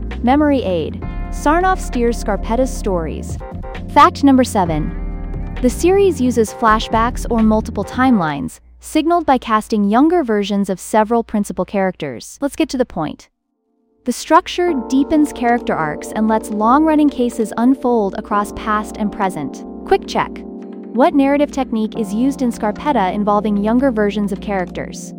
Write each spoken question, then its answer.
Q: What narrative technique is used in Scarpetta involving younger versions of characters?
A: flashbacks or multiple timelines.